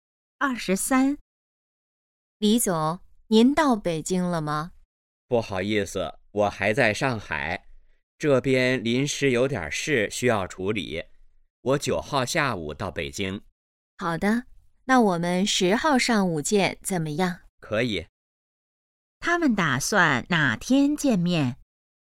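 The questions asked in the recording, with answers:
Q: 他们打算哪天见面?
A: 10号上午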